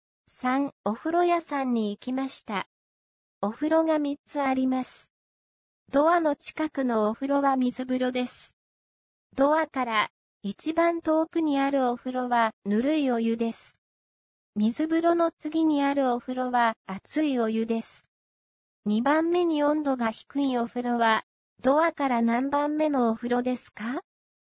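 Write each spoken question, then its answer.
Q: 2番目に温度が低いお風呂はドアから何番目のお風呂ですか?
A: ドアから3番目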